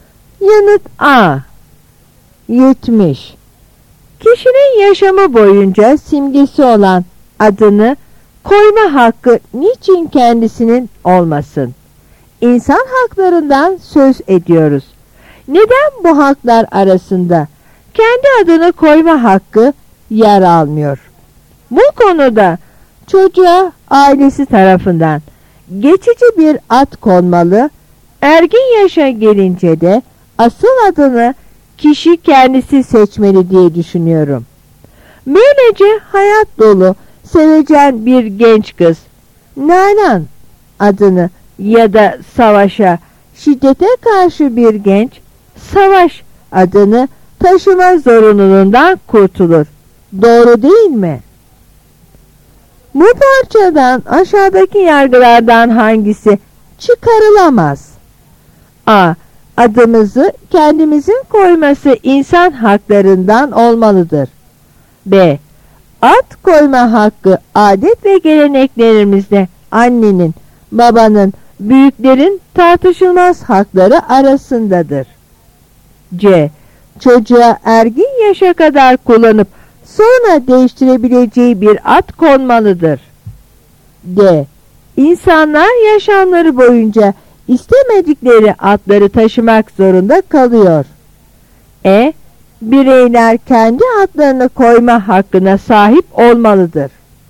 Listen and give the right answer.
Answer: Yanıt B.